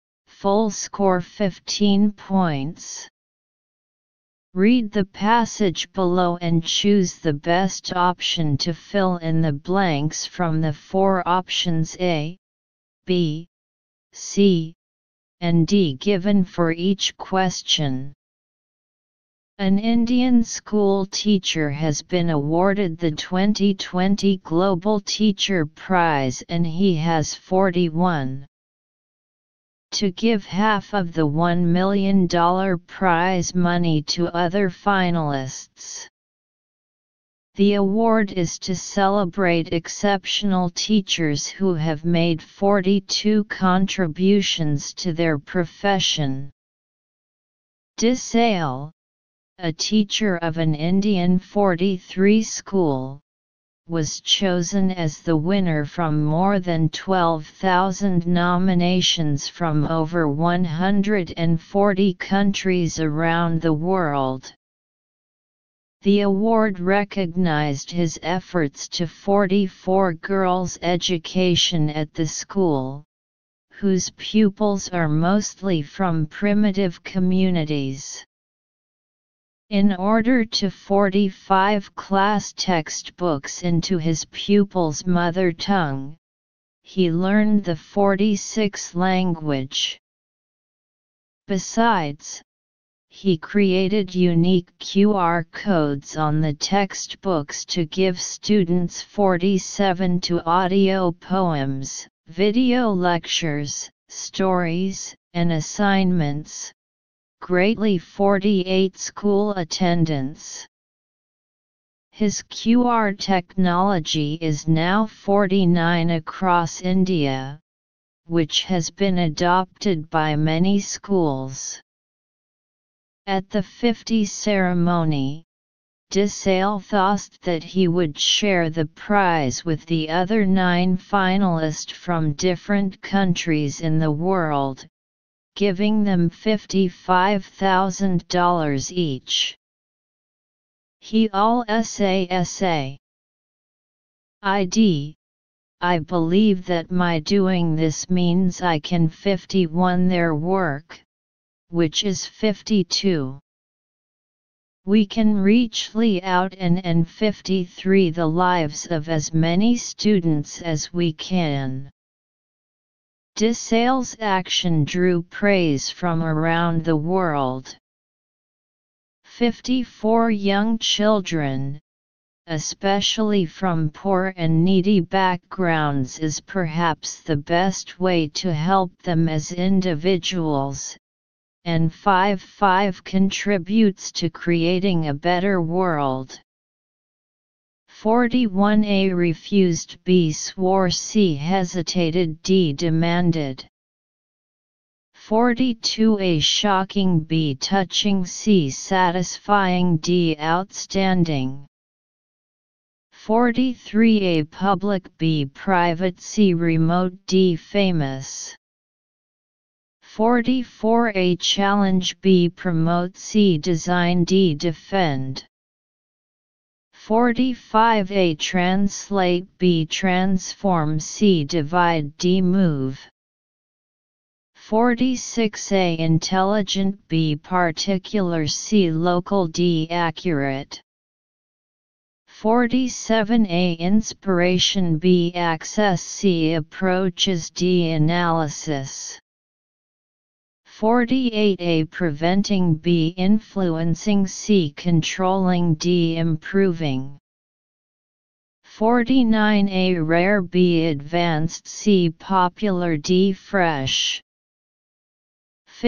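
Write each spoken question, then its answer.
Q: 41 A refused, B swore, C hesitated, D demanded.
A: B: swore

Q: 42 A shocking, B touching, C satisfying, D outstanding.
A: D: outstanding

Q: 44 A challenge, B promote, C design, D defend.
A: B: promote

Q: 45 A translate, B transform, C divide, D move.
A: A: translate

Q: 46 A intelligent, B particular, C local, D accurate.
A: C: local

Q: 47 A inspiration, B access, C approaches, D analysis.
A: B: access

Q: 48 A preventing, B influencing, C controlling, D improving.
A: D: improving

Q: 49 A rare, B advanced, C popular, D fresh.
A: C: popular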